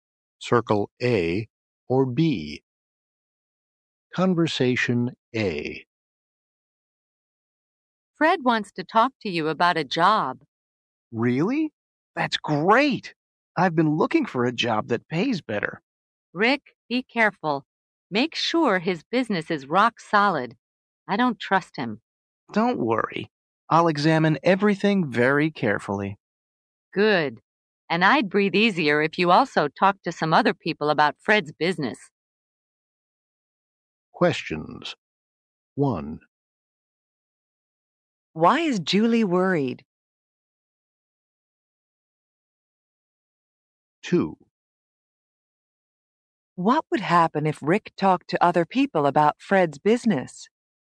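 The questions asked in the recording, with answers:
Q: Why is Julie worried?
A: She doesn't trust Fred.

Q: What would happen if Rick talked to other people about Fred's business?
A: Julie would feel less worried.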